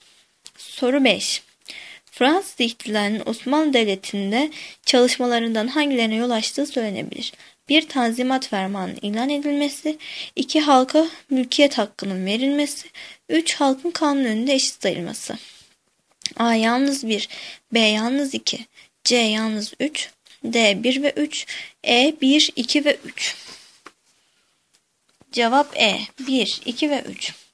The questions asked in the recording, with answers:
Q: Fransız İhtilali'nin Osmanlı Devleti'nde çalışmalarından hangilerine yol açtığı söylenebilir?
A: Cevap E. 1, 2 ve 3.